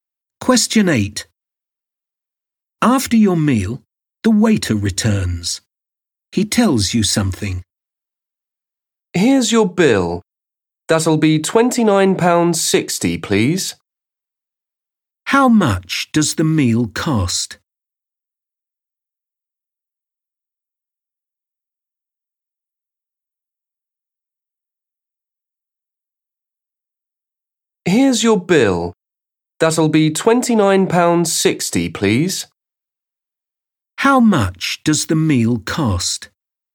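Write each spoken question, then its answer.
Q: How much does the meal cost?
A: £29.60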